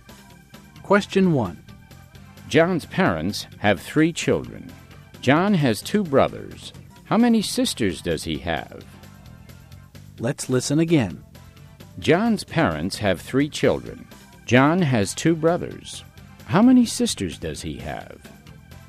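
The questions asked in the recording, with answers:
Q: How many sisters does he have?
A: None (zero)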